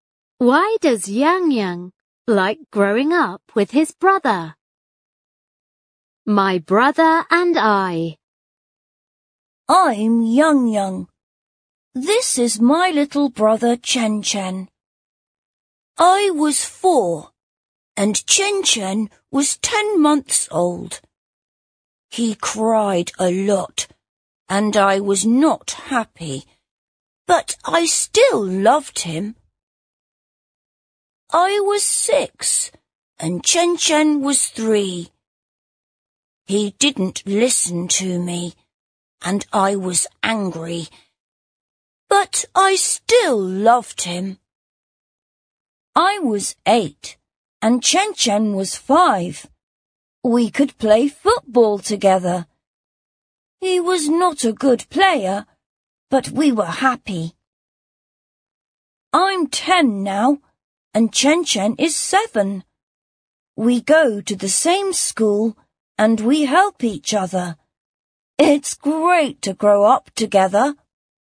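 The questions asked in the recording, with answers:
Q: Why does Yang Yang like growing up with his brother?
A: Because they play together and help each other; it's great to grow up together.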